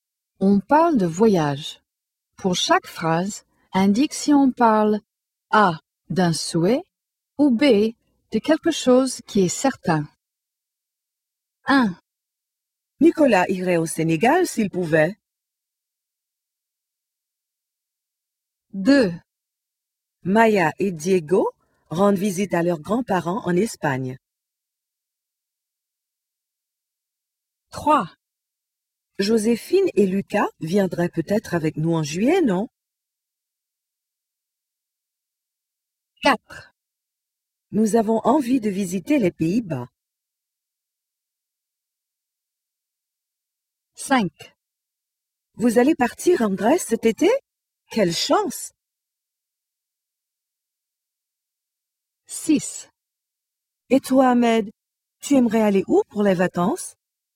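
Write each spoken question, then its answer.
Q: Nicolas irait au Sénégal s'il pouvait.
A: A: un souhait

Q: Maya et Diego rendent visite à leurs grands-parents en Espagne.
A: B: quelque chose qui est certain

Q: Vous allez partir en Grèce cet été?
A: B: quelque chose qui est certain

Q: Et toi, Ahmed, tu aimerais aller où pour les vacances?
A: A: un souhait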